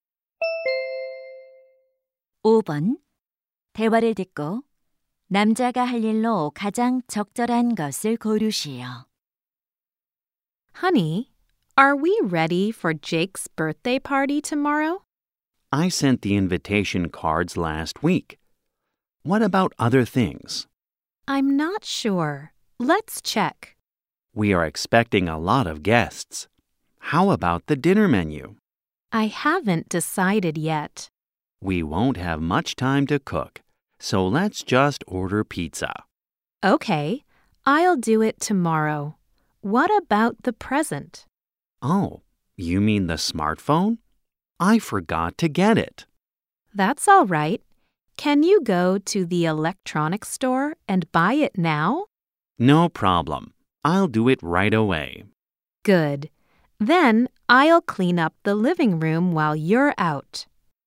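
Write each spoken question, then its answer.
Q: 대화를 듣고 남자가 할 일로 가장 적절한 것을 고르시오.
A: 전자제품 매장에 가서 스마트폰 선물 사기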